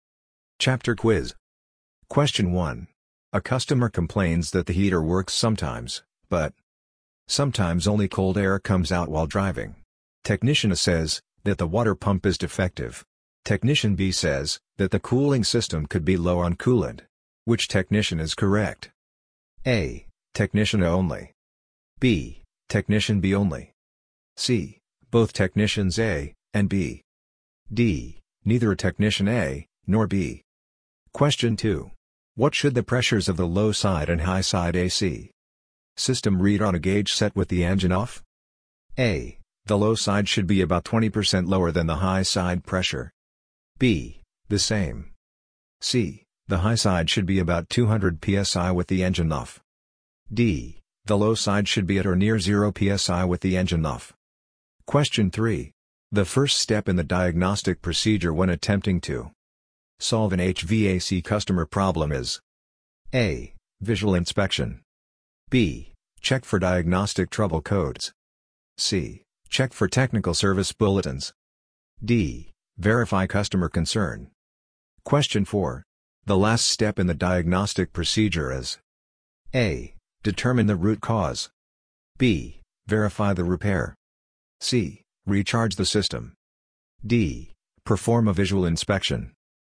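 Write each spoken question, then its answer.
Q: A customer complains that the heater works sometimes, but sometimes only cold air comes out while driving. Technician A says that the water pump is defective. Technician B says that the cooling system could be low on coolant. Which technician is correct?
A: B: Technician B only.

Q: What should the pressures of the low side and high side AC system read on a gauge set with the engine off?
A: B: The same.

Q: The first step in the diagnostic procedure when attempting to solve an HVAC customer problem is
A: D: Verify customer concern.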